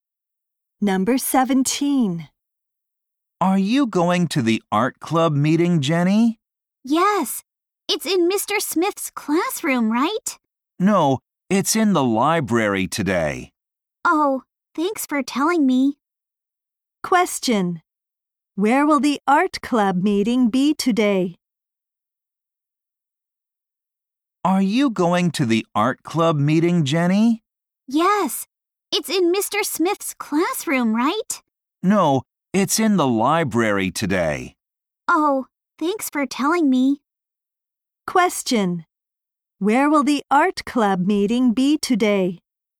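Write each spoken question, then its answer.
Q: Where will the art club meeting be today?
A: In the library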